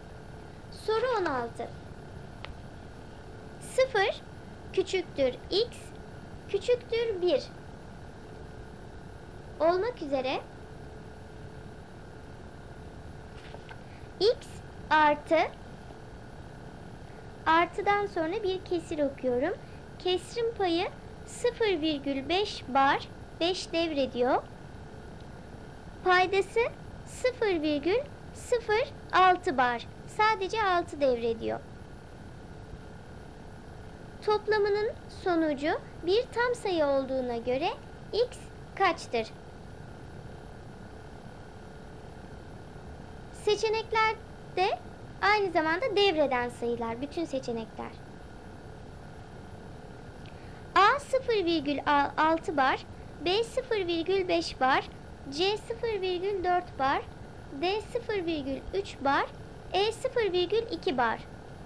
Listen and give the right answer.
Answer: Doğru cevap A 0,6 bar.